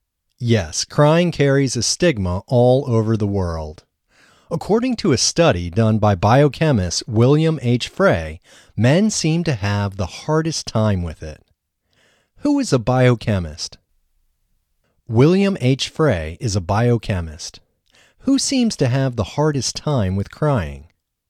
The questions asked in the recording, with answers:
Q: Who seems to have the hardest time with crying?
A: Men seem to have the hardest time with crying.